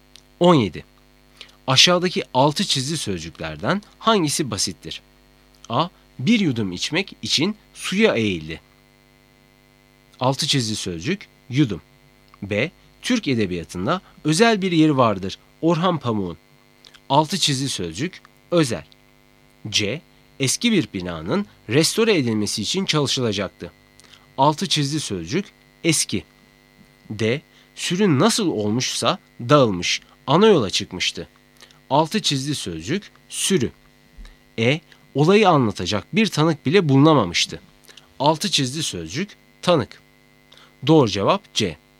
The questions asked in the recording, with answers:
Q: Aşağıdaki altı çizgi sözcüklerden hangisi basittir?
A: Doğru cevap C.